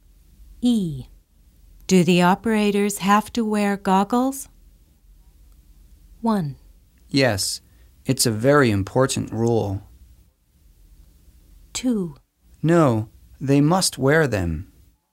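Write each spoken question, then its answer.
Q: Do the operators have to wear goggles?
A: 1: Yes, it's a very important rule.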